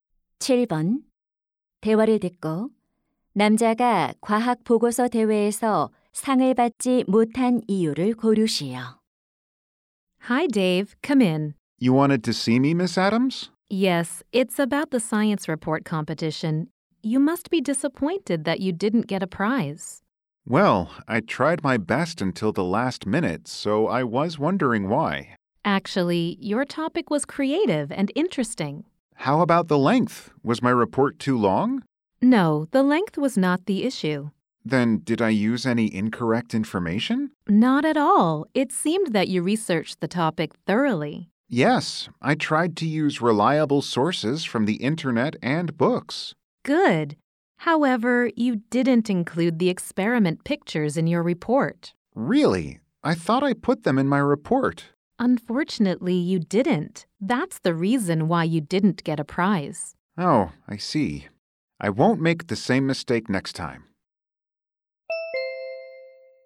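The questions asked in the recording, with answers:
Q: 대화를 듣고 남자가 과학 보고서 대회에서 상을 받지 못한 이유를 고르시오.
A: 보고서에 실험 사진을 넣지 않아서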